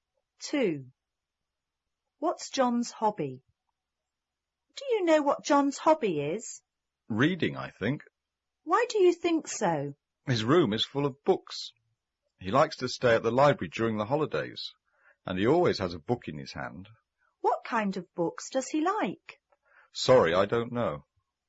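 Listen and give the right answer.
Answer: Reading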